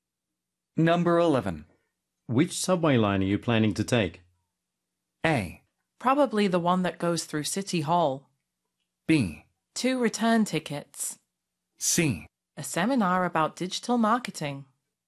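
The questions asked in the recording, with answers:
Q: Which subway line are you planning to take?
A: A: Probably the one that goes through City Hall.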